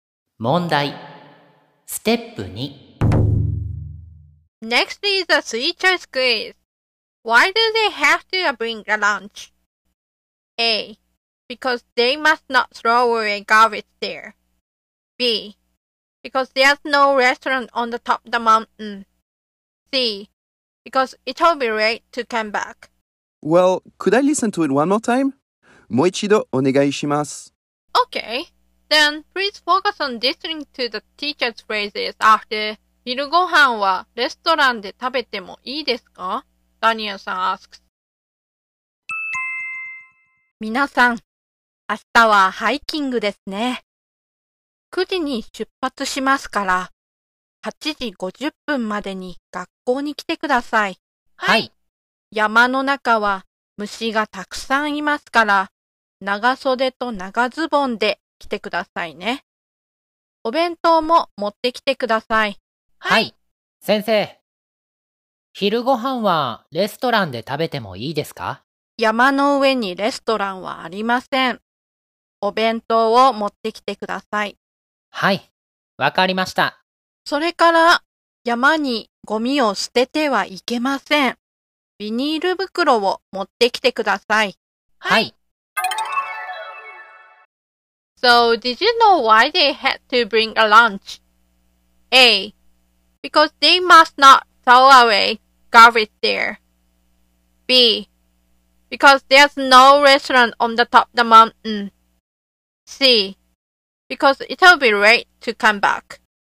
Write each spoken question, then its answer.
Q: So, did you know why they had to bring a lunch?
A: So the answer is B.